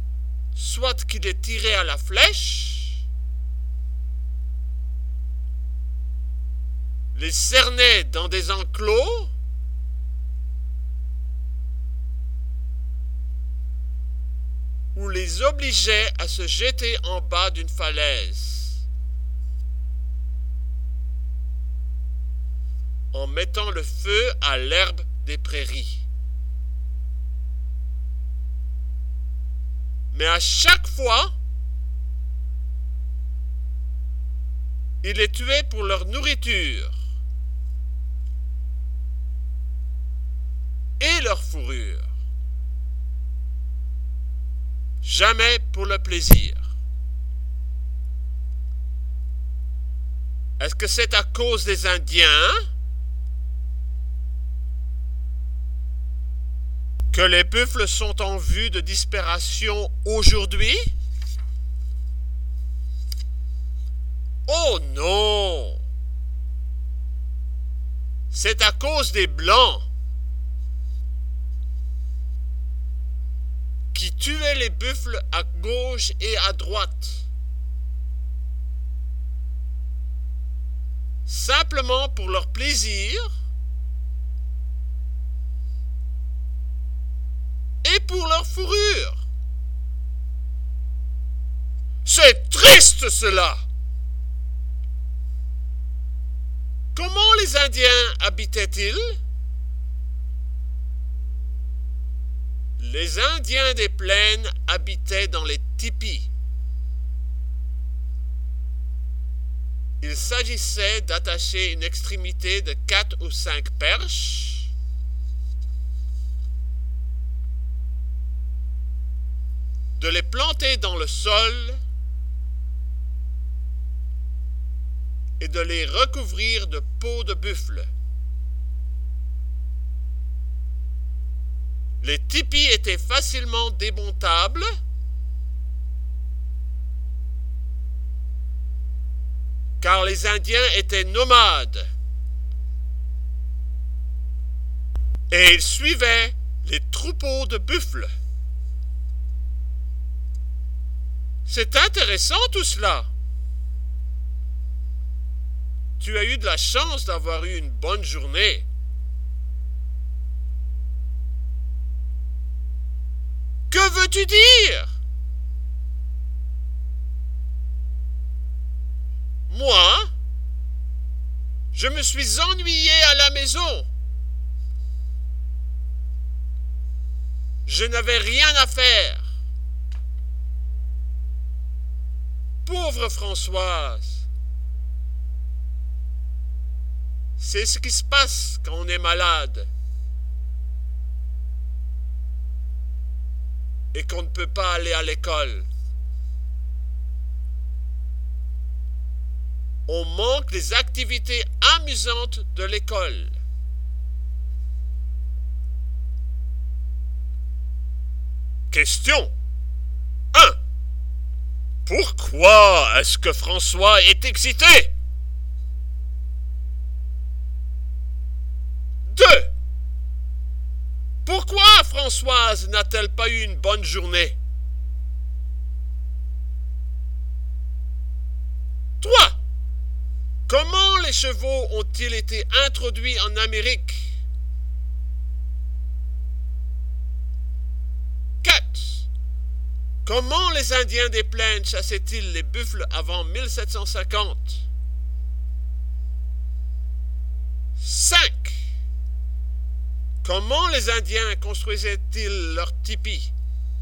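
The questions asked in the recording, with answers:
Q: Pourquoi Françoise n'a-t-elle pas eu une bonne journée?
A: Elle était malade, restée à la maison, et elle s'est ennuyée sans rien à faire.

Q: Comment les Indiens construisaient-ils leurs tipis?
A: Ils attachaient une extrémité de 4 ou 5 perches, les plantaient dans le sol et les recouvraient de peaux de buffle.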